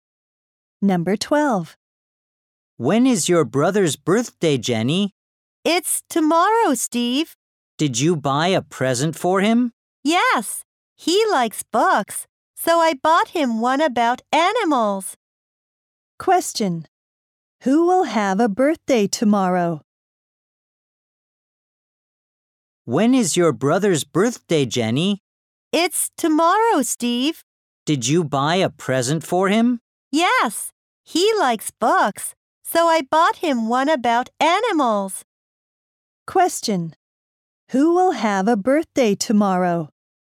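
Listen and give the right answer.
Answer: Jenny's brother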